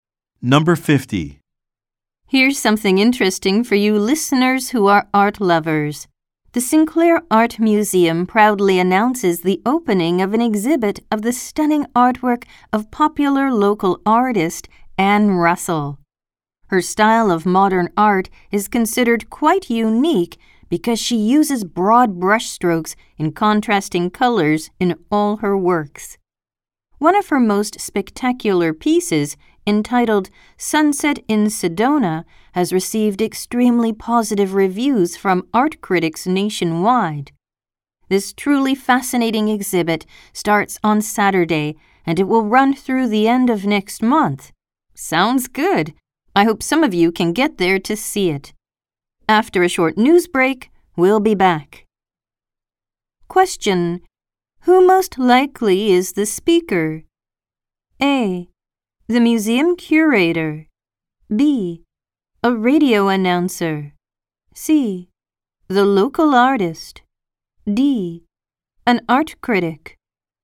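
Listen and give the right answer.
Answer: B: A radio announcer.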